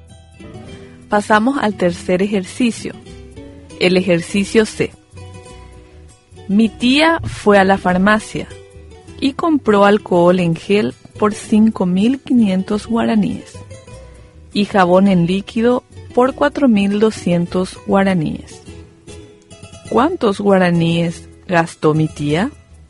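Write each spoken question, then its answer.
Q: ¿Cuántos guaraníes gastó mi tía?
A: 9.700 guaraníes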